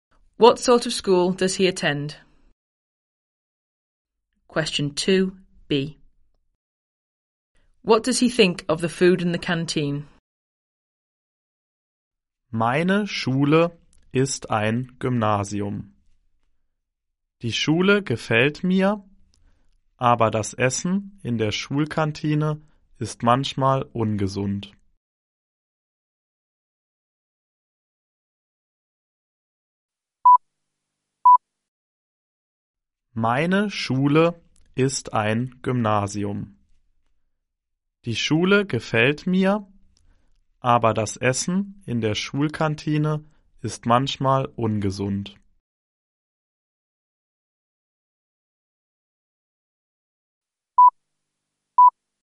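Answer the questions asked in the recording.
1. A Gymnasium (grammar school)
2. It is sometimes unhealthy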